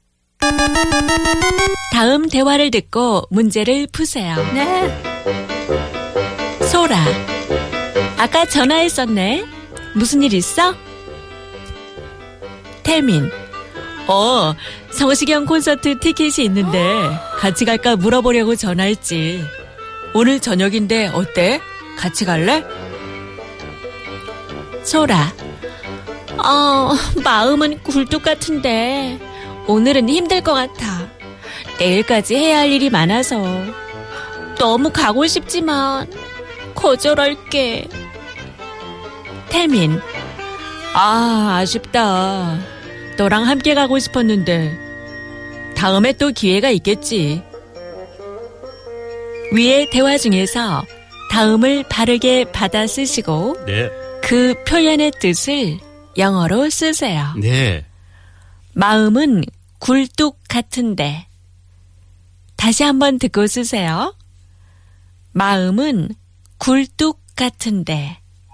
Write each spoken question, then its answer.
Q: 그 표현의 뜻을 영어로 쓰세요.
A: you want to really bad, you're very tempted to do something, but circumstantially, you can't.